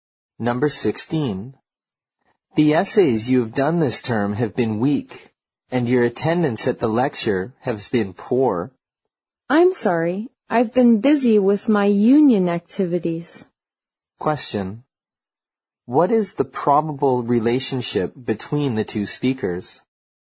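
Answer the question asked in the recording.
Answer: Teacher and student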